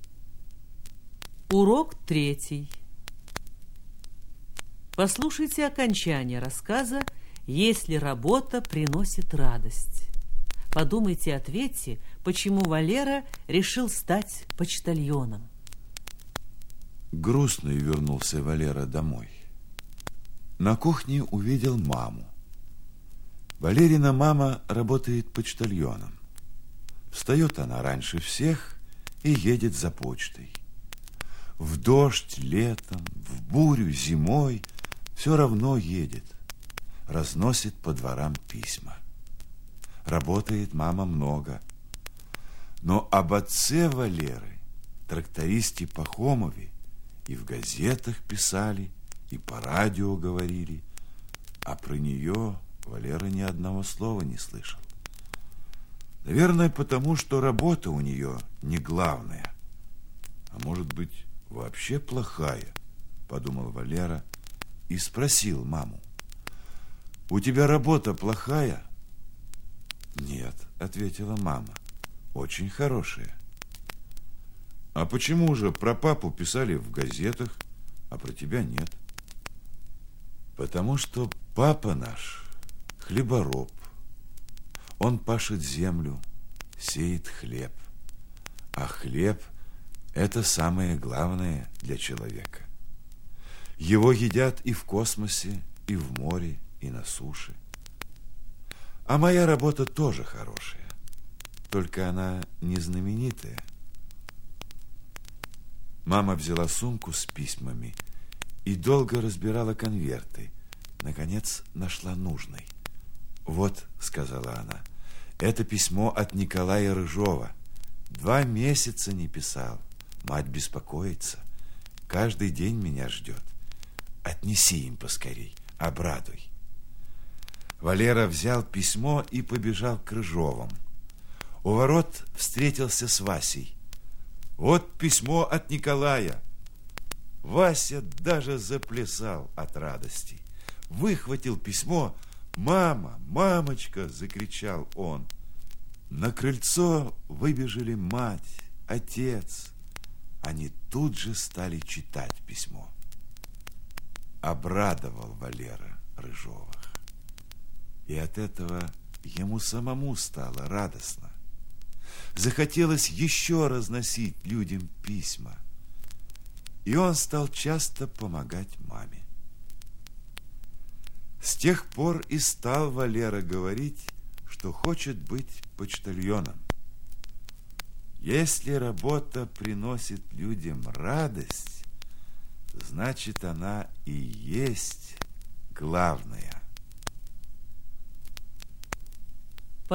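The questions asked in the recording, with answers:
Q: Подумайте и ответьте, почему Валера решил стать почтальоном.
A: Потому что эта работа приносит людям радость: он обрадовал Рыжовых письмом, и ему самому стало радостно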